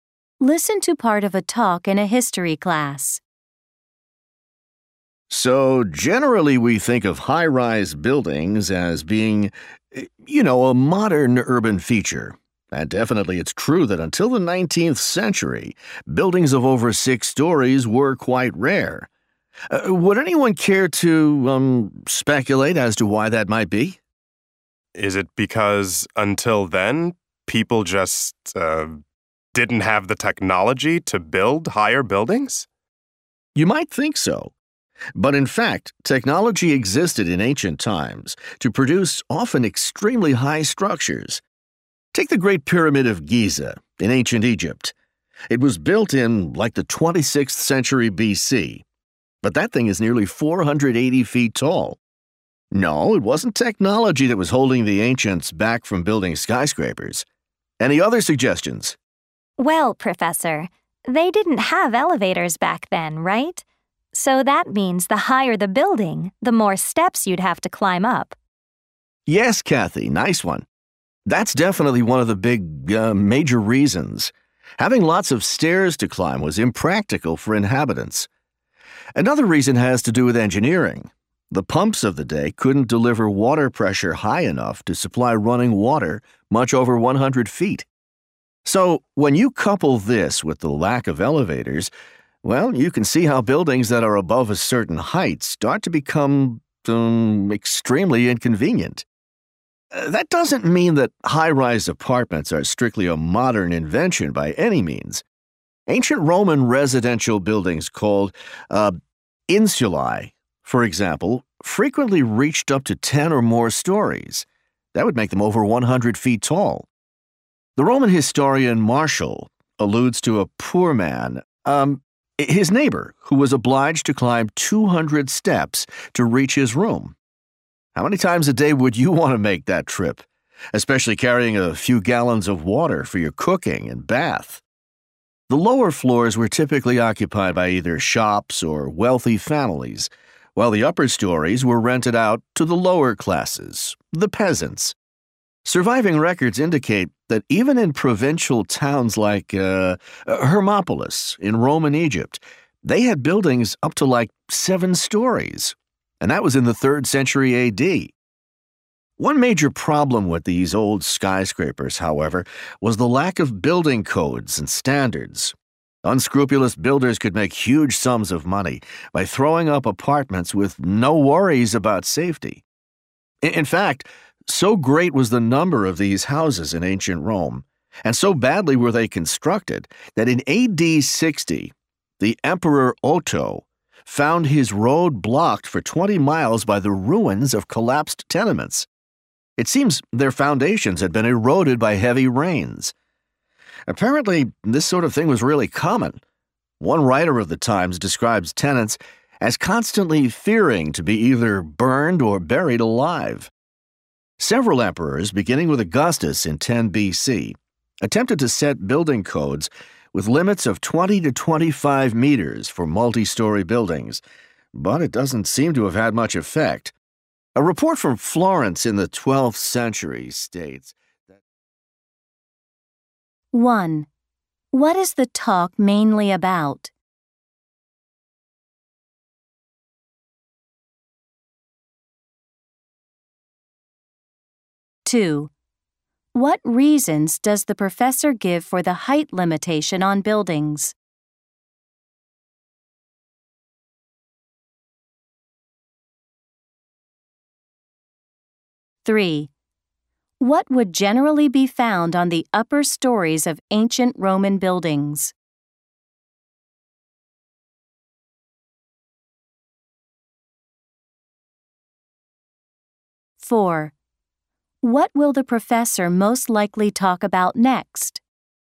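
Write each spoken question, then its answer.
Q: What is the talk mainly about?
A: Early high-rise buildings before modern times

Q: What reasons does the professor give for the height limitation on buildings?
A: No elevators, so many stairs to climb, and pumps could not supply water much above 100 feet

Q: What would generally be found on the upper stories of ancient Roman buildings?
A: Rented rooms of the lower classes (poor people)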